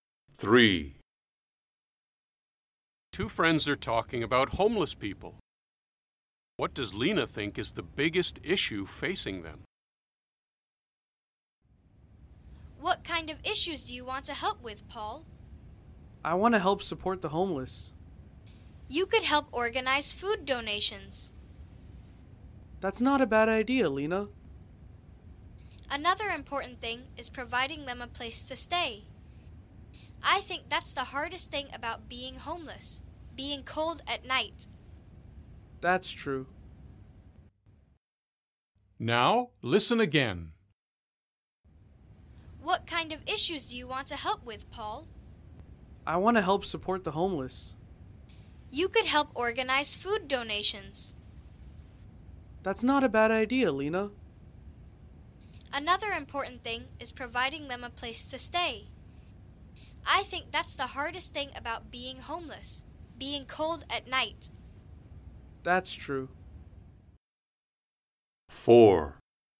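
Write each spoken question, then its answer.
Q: What does Lena think is the biggest issue facing them?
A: Having a place to stay (being cold at night)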